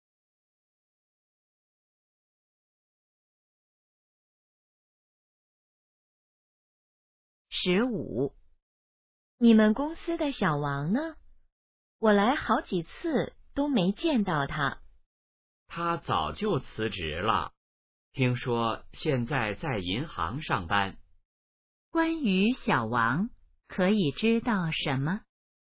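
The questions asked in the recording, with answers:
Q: 关于小王,可以知道什么?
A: 他辞职了,现在在银行上班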